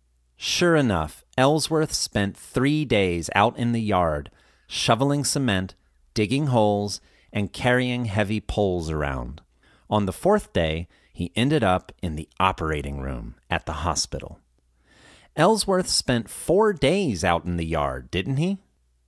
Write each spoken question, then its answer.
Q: Ellsworth spent 4 days out in the yard, didn't he?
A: No, he didn't. He spent 3 days out in the yard.